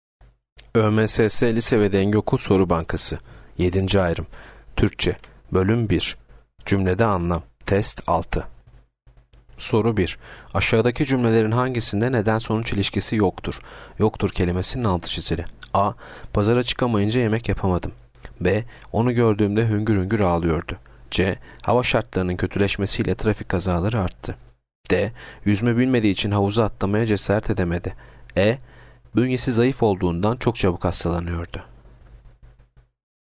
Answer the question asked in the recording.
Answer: Yanıt B. Onu gördüğümde hüngür hüngür ağlıyordu.